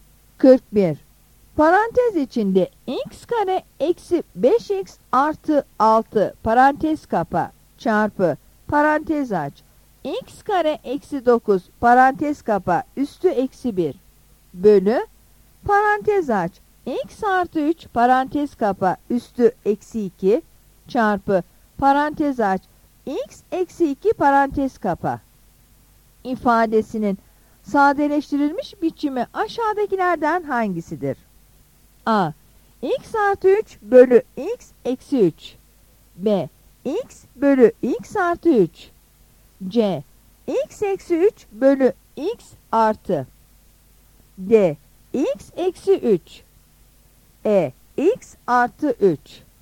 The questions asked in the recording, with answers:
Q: Parantez içinde x kare eksi 5x artı 6 parantez kapa çarpı parantez aç x kare eksi 9 parantez kapa üstü eksi 1 bölü parantez aç x artı 3 parantez kapa üstü eksi 2 çarpı parantez aç x eksi 2 parantez kapa ifadesinin sadeleştirilmiş biçimi aşağıdakilerden hangisidir?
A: Yanıt E'dir.